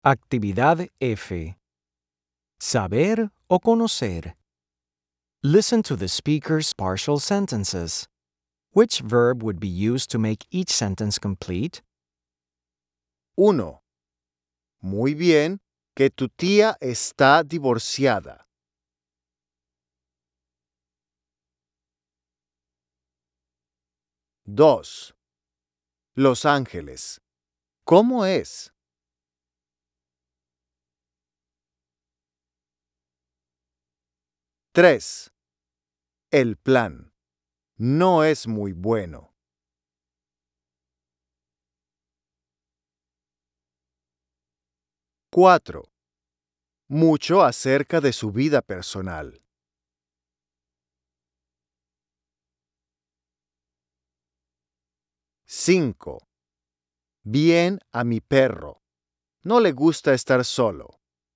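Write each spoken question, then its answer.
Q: Muy bien que tu tía está divorciada.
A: saber

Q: Los Ángeles. ¿Cómo es?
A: conocer

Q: Mucho acerca de su vida personal.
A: saber

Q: Bien a mi perro. No le gusta estar solo.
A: conocer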